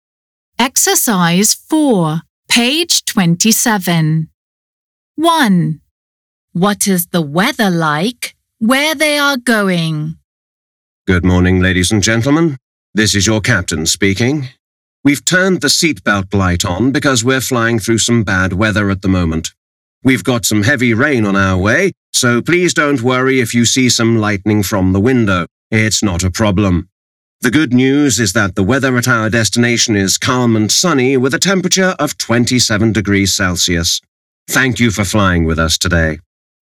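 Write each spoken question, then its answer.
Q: What is the weather like where they are going?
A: Calm and sunny, 27 degrees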